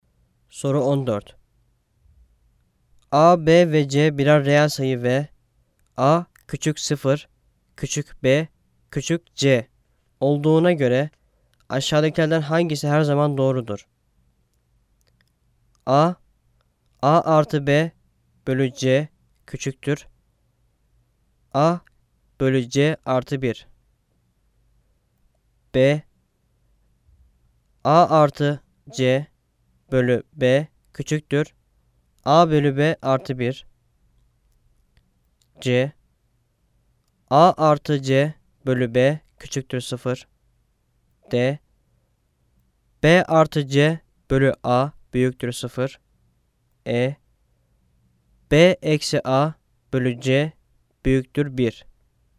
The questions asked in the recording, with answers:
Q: A, B ve C birer reel sayı ve A küçük 0, küçük B, küçük C olduğuna göre aşağıdakilerden hangisi her zaman doğrudur?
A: Cevap A, A artı B bölü C küçüktür. A artı C artı 1.